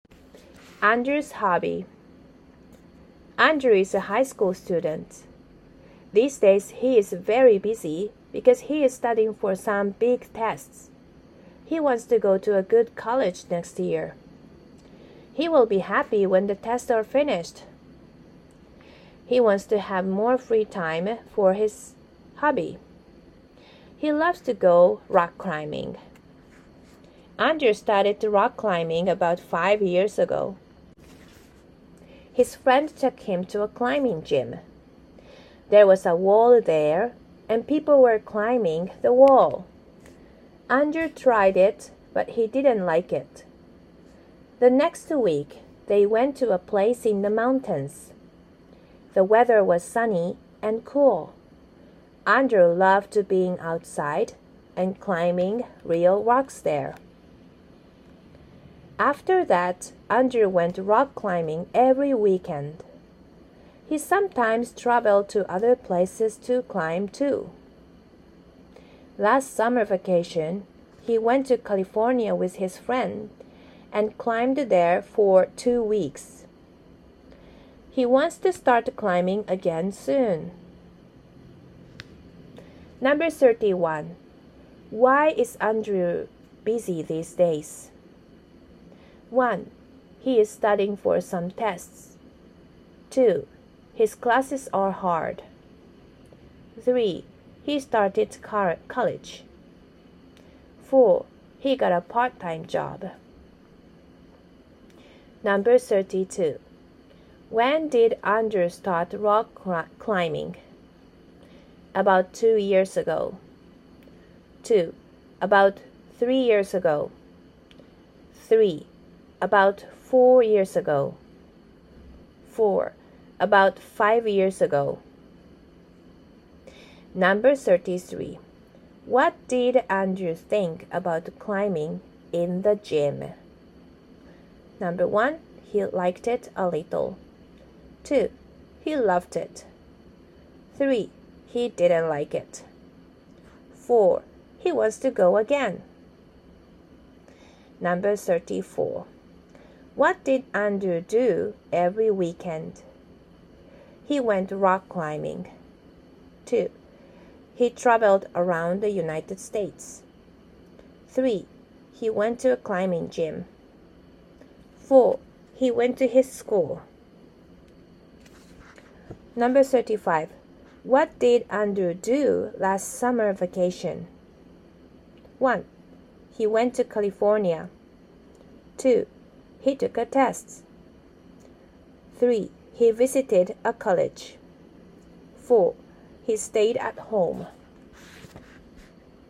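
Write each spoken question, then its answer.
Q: Why is Andrew busy these days?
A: 1: He is studying for some tests.

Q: When did Andrew start rock climbing?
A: 4: About 5 years ago.

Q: What did Andrew think about climbing in the gym?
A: 3: He didn't like it.

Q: What did Andrew do every weekend?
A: 1: He went rock climbing.

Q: What did Andrew do last summer vacation?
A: 1: He went to California.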